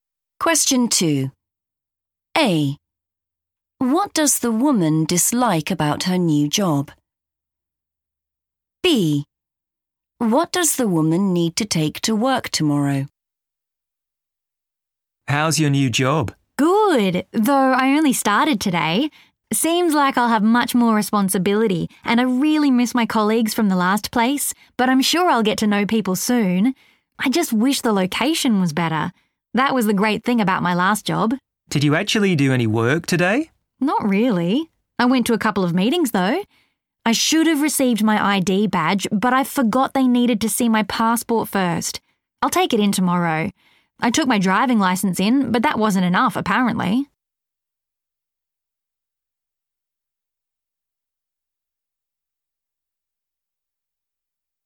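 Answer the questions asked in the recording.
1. the location
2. her passport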